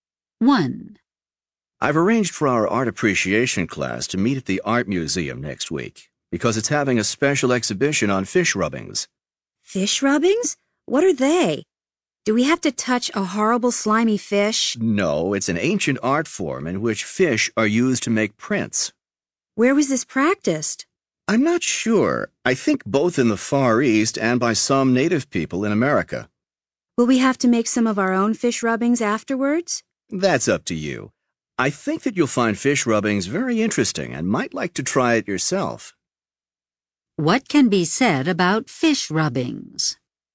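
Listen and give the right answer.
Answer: They are an ancient art form in which fish are used to make prints.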